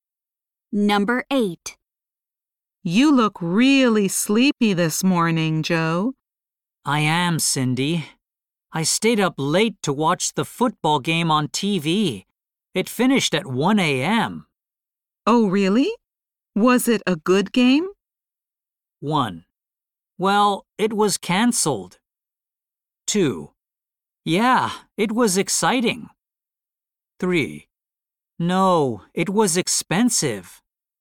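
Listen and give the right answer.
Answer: 2: Yeah, it was exciting.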